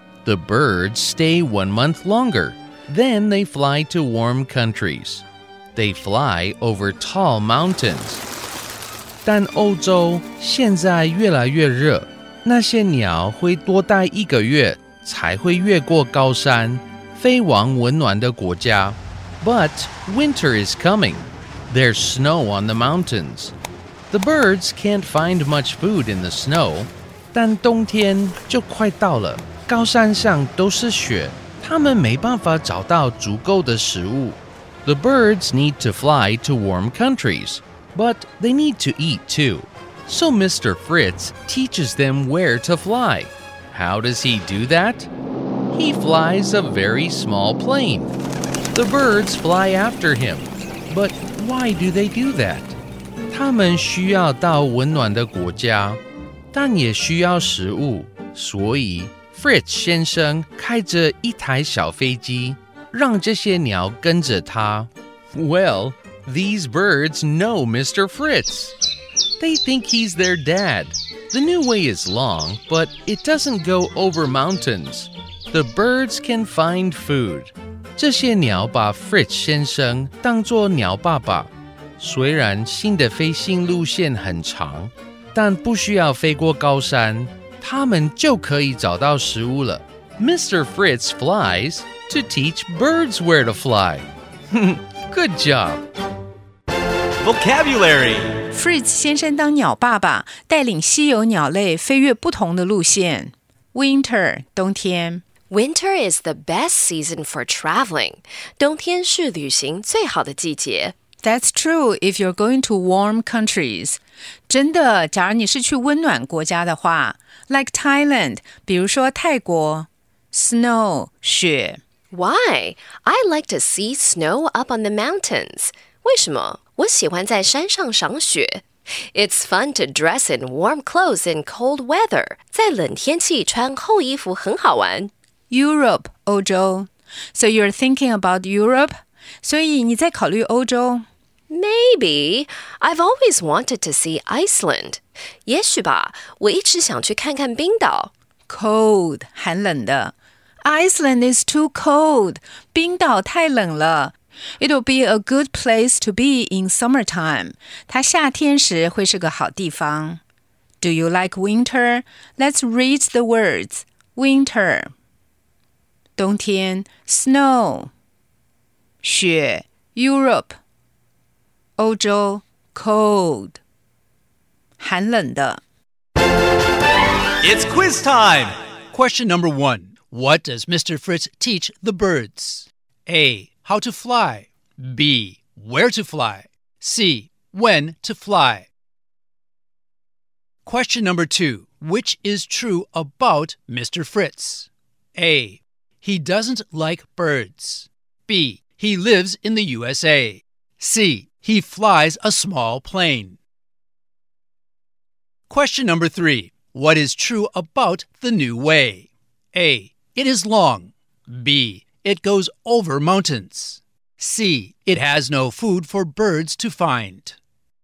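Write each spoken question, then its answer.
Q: What does Mr. Fritz teach the birds?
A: B: Where to fly.

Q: Which is true about Mr. Fritz?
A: C: He flies a small plane.

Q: What is true about the new way?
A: A: It is long.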